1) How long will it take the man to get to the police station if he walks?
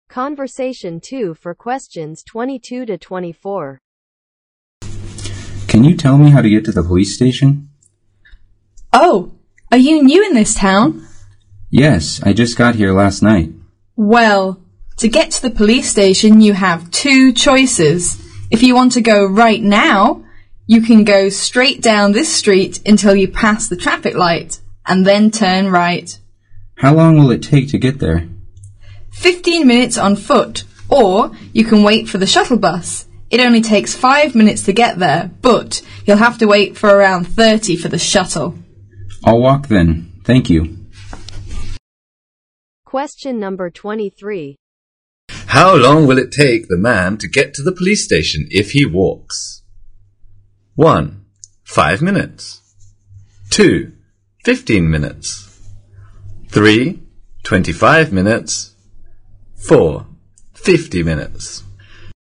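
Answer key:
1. 15 minutes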